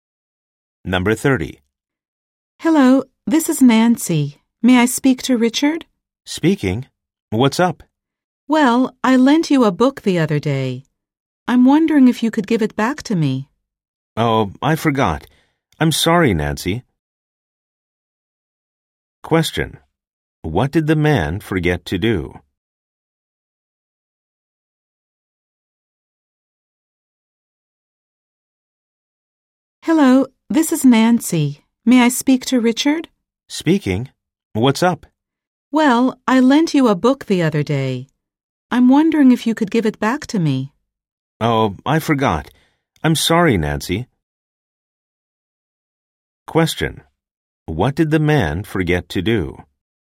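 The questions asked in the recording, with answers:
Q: What did the man forget to do?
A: Give Nancy's book back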